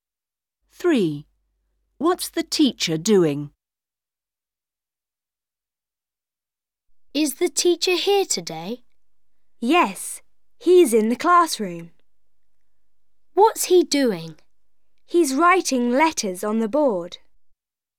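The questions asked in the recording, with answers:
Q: What's the teacher doing?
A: Writing letters on the board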